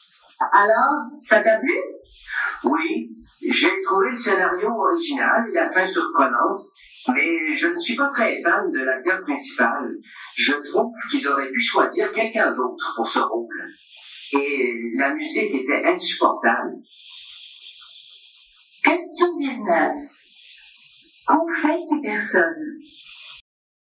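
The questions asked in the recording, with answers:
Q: Qu'ont fait ces personnes?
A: Elles ont vu un film.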